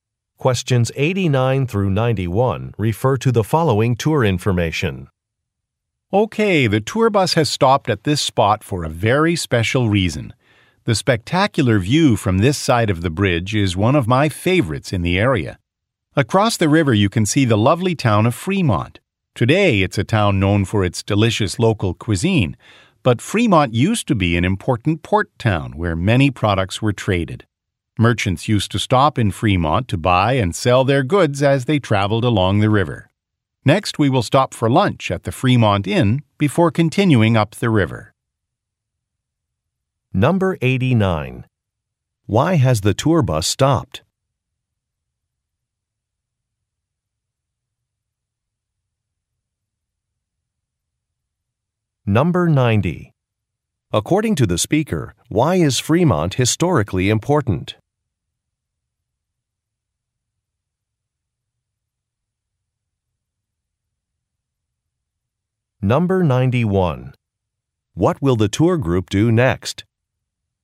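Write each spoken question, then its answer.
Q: Why has the tour bus stopped?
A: To enjoy the view

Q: According to the speaker, why is Fremont historically important?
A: It was an important port town for trade

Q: What will the tour group do next?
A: Have lunch at the Fremont Inn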